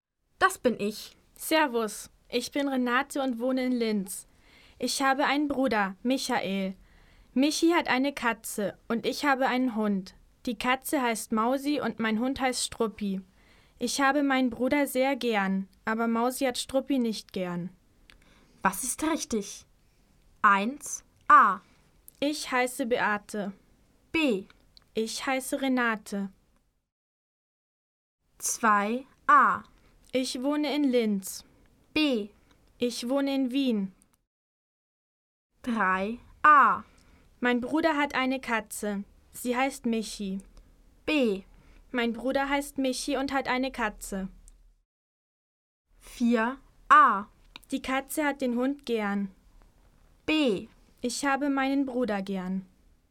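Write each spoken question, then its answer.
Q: Was ist richtig? 1. A. Ich heiße Beate. B. Ich heiße Renate.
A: B: Ich heiße Renate.

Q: 2. A. Ich wohne in Linz. B. Ich wohne in Wien.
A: A: Ich wohne in Linz.

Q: 3. A. Mein Bruder hat eine Katze. Sie heißt Michi. B. Mein Bruder heißt Michi und hat eine Katze.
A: B: Mein Bruder heißt Michi und hat eine Katze.

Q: 4. A. Die Katze hat den Hund gern. B. Ich habe meinen Bruder gern.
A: B: Ich habe meinen Bruder gern.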